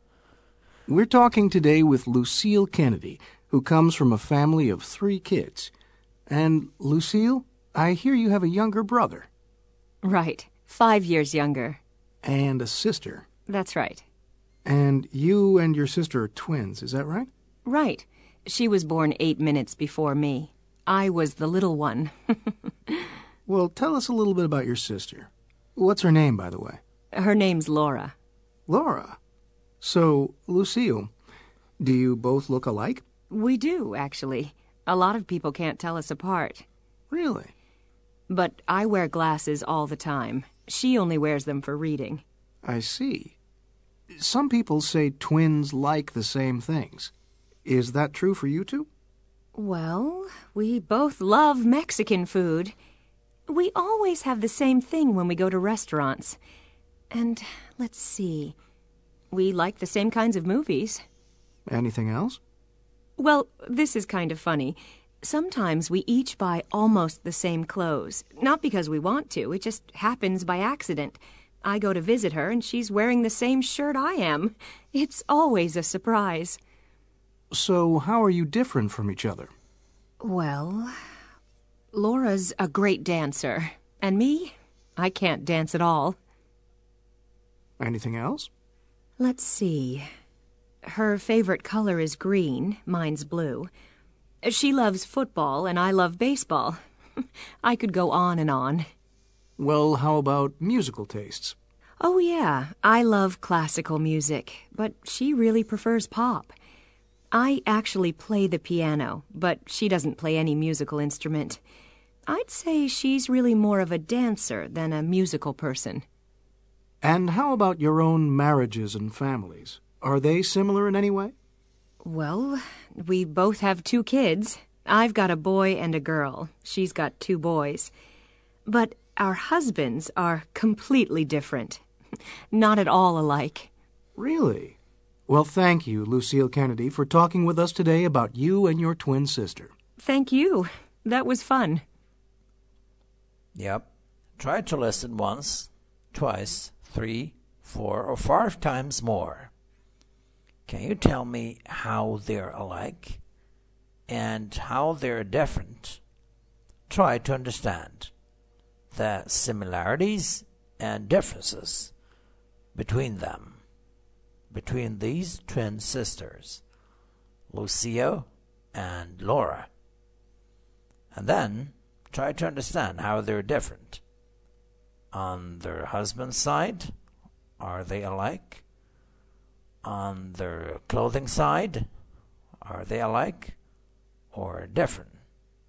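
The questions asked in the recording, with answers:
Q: On their husband's side, are they alike?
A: No, their husbands are completely different.

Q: On their clothing side, are they alike or different?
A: Alike; they sometimes buy almost the same clothes.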